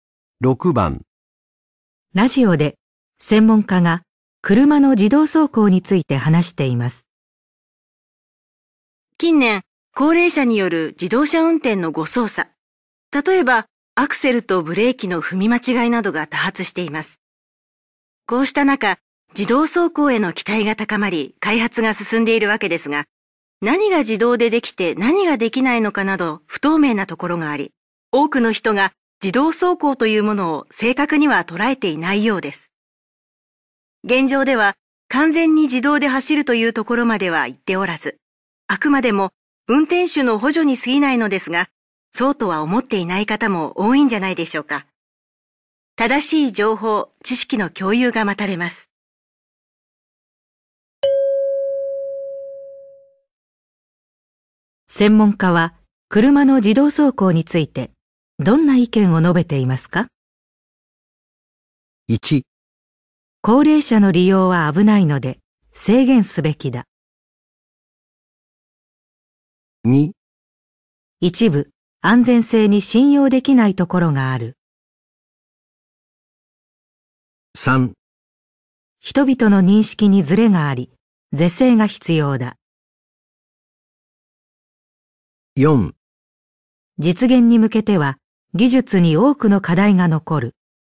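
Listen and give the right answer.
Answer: 3: 人々の認識にズレがあり、是正が必要だ。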